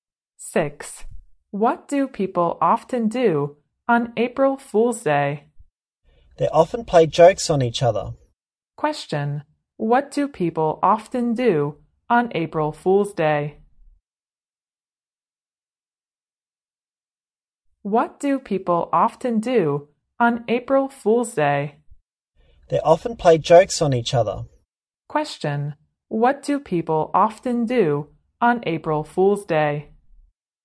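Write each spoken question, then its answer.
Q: What do people often do on April Fool's Day?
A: They play jokes on each other.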